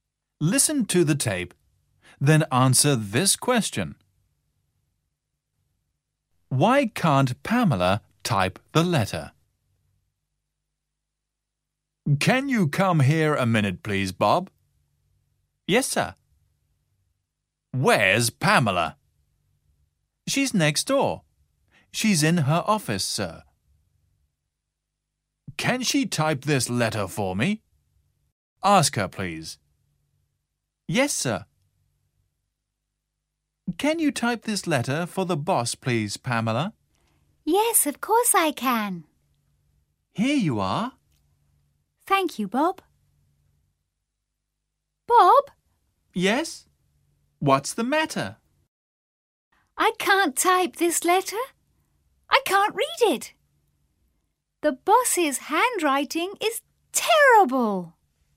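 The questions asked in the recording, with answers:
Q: Why can't Pamela type the letter?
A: Because she can't read it; the boss's handwriting is terrible.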